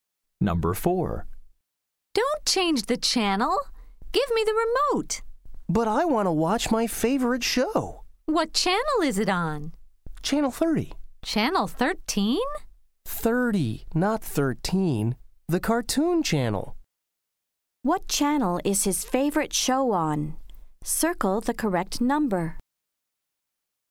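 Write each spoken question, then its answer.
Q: What channel is his favorite show on? Circle the correct number.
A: Channel 30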